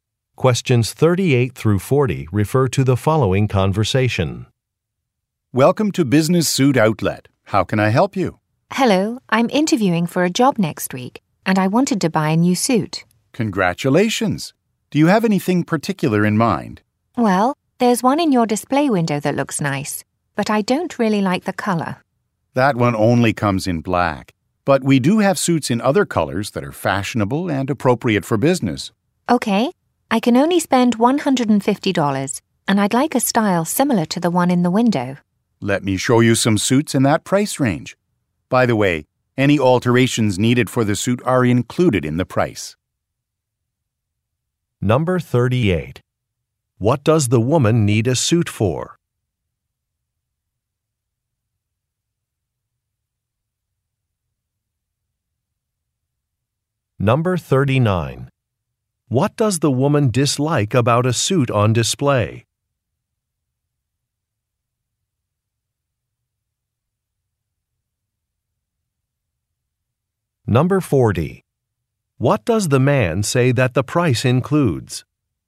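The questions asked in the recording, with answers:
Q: What does the woman need a suit for?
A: A job interview

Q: What does the woman dislike about a suit on display?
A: The color

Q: What does the man say that the price includes?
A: Alterations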